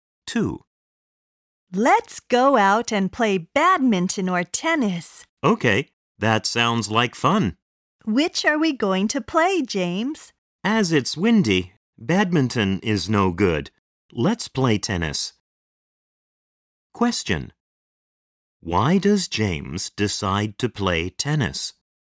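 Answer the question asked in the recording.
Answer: Because it's windy, so badminton is no good.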